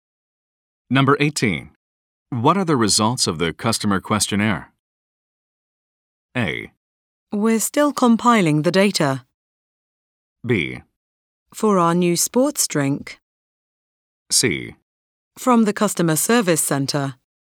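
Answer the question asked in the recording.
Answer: A: We're still compiling the data.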